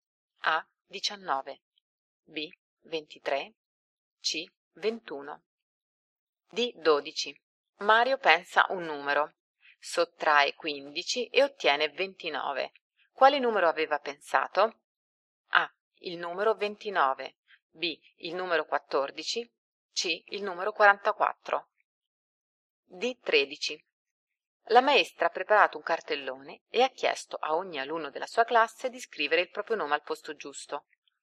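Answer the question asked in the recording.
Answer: C: Il numero 44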